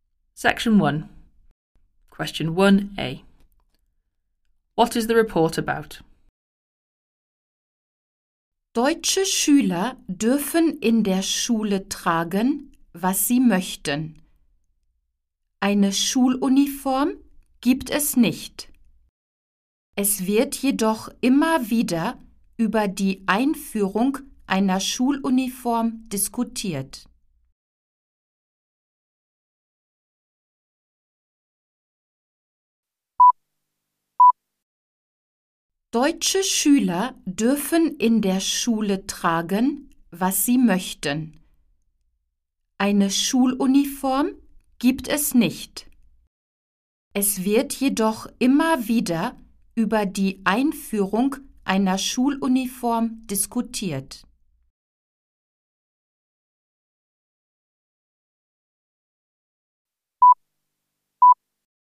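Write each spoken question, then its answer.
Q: What is the report about?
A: The debate about introducing school uniforms in Germany, where pupils can wear what they want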